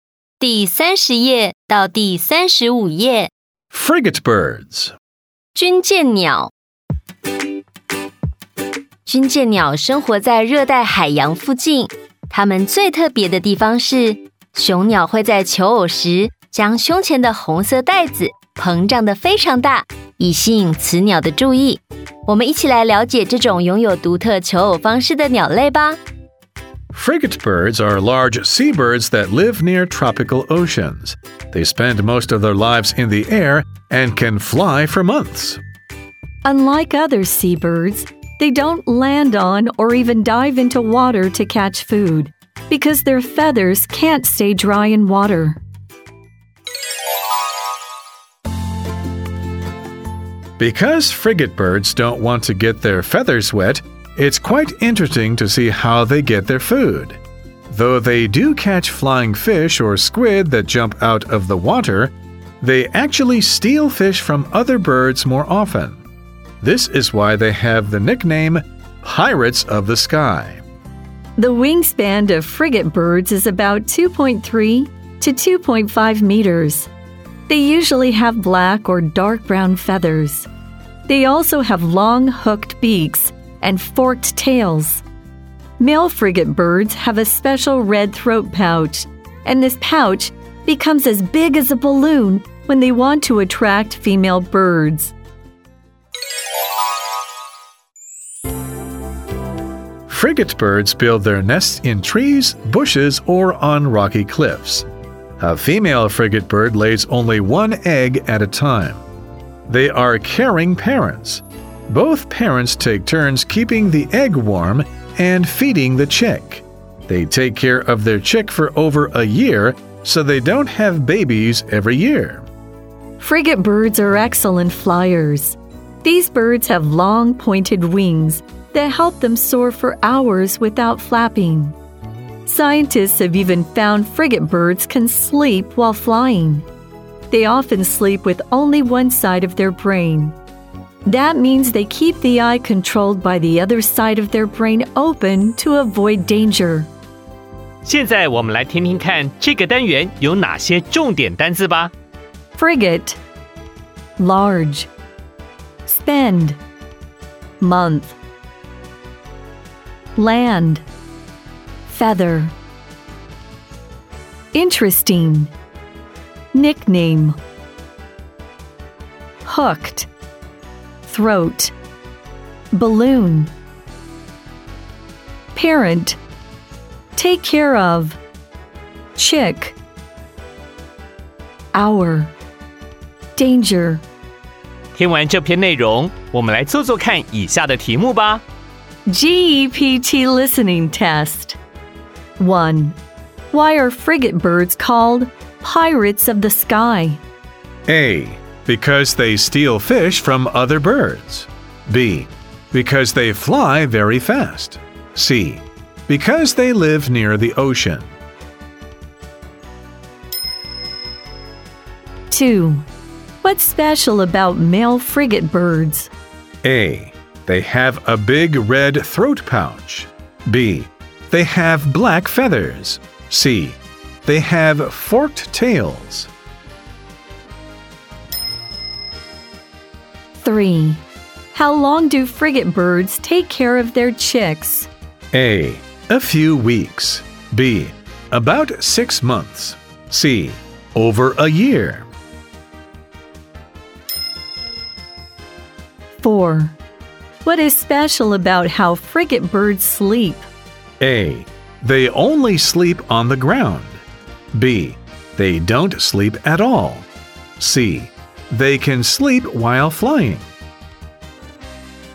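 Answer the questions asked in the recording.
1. A: Because they steal fish from other birds.
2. A: They have a big red throat pouch.
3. C: Over a year.
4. C: They can sleep while flying.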